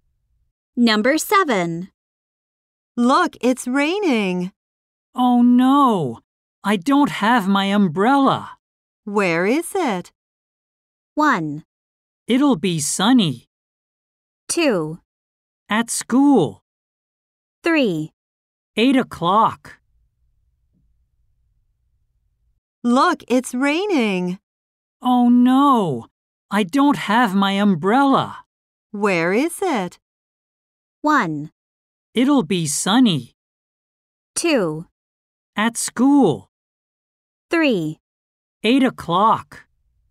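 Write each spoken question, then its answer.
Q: Where is it?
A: 2: At school.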